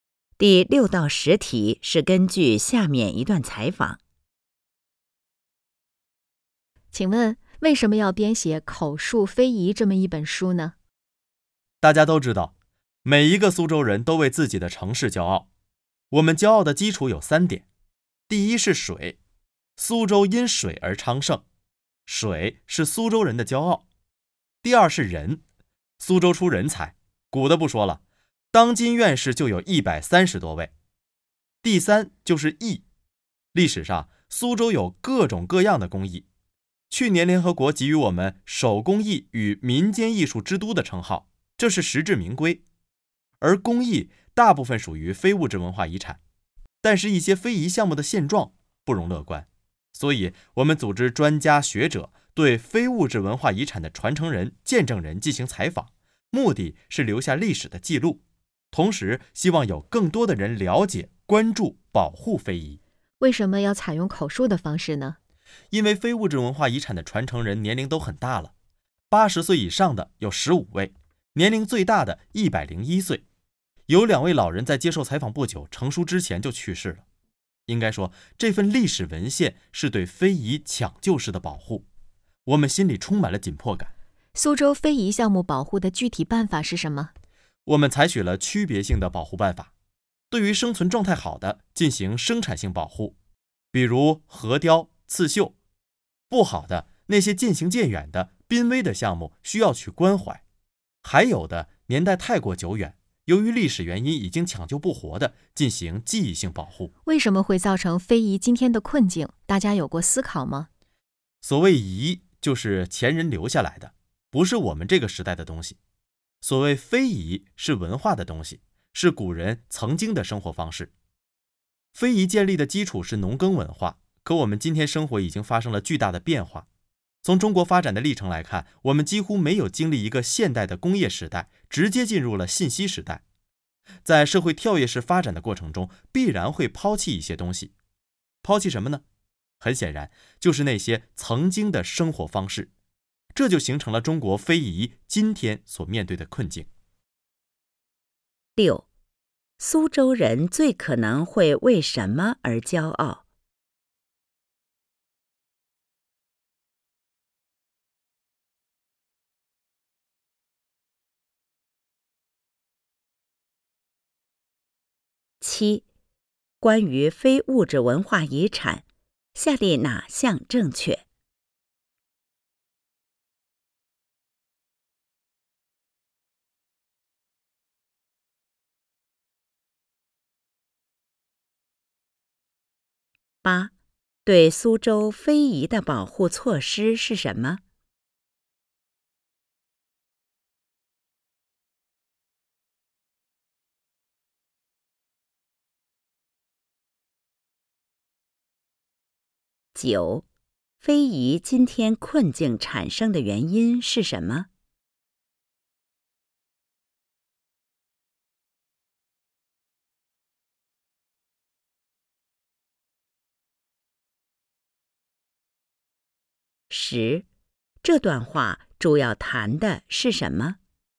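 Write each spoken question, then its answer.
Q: 苏州人最可能会为什么而骄傲?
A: 水、人才和工艺

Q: 对苏州非遗的保护措施是什么?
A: 区别性保护:生产性保护、关怀濒危项目、记忆性保护

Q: 非遗今天困境产生的原因是什么?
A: 社会跳跃式发展,抛弃了曾经的农耕生活方式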